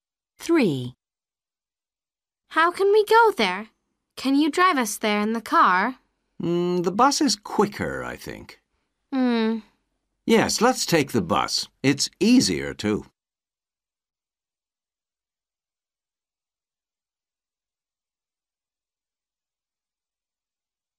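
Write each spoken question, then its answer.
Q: How can we go there?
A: by bus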